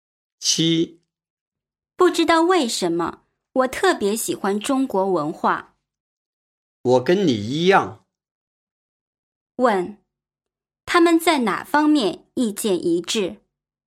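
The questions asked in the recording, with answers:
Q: 问,他们在哪方面意见一致?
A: 都特别喜欢中国文化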